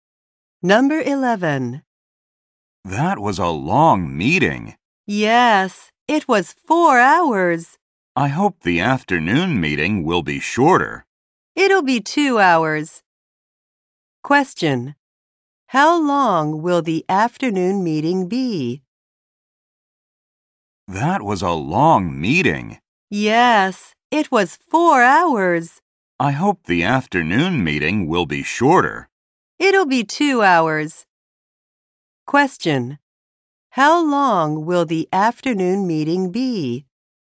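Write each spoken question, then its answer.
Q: how long will the afternoon meeting be?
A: 2 hours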